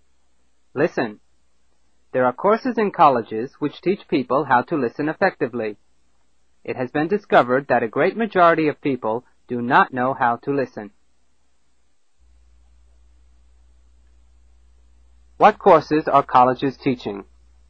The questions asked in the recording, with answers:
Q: What courses are colleges teaching?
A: Listening.